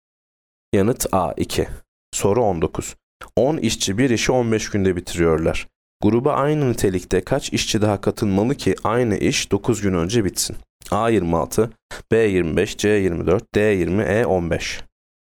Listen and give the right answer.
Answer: Yanıt E 15.